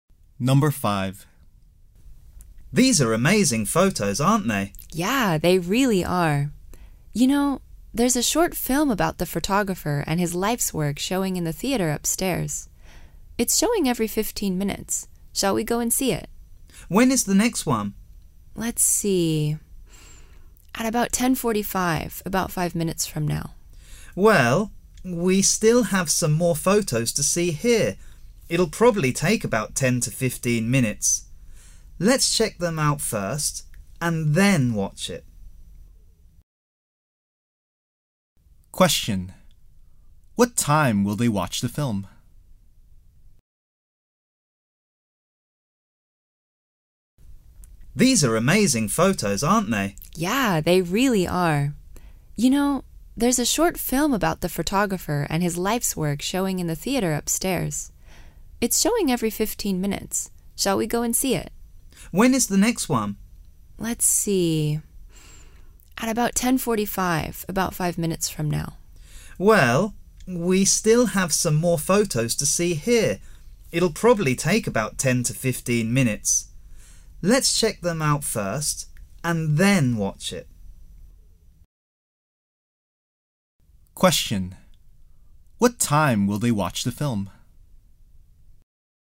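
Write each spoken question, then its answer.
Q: What time will they watch the film?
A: At about 11:00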